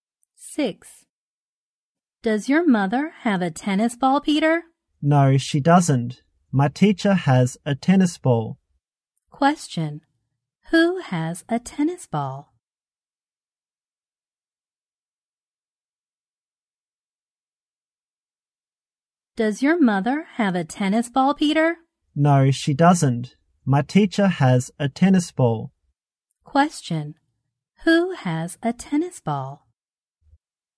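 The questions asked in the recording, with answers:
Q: Who has a tennis ball?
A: Peter's teacher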